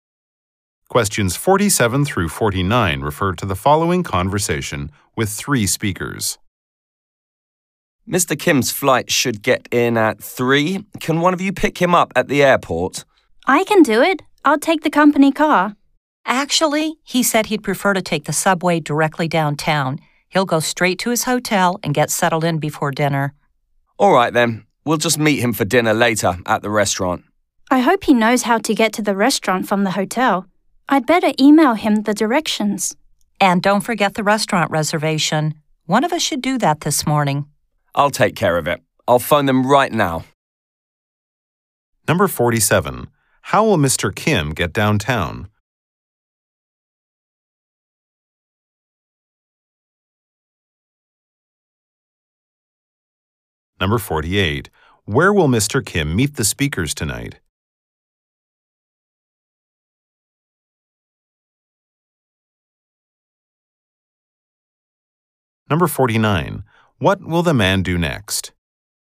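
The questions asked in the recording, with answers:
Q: How will Mr. Kim get downtown?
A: By subway.

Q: Kim meet the speakers tonight?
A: At the restaurant.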